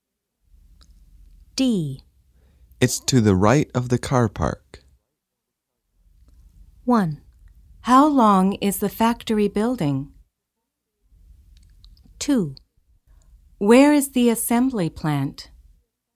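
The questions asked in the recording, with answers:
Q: It's to the right of the car park.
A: 2: Where is the assembly plant?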